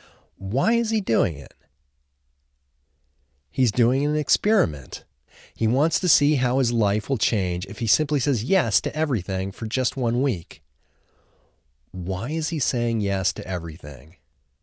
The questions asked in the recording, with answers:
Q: Why is he saying yes to everything?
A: He wants to see how his life will change by saying yes to everything.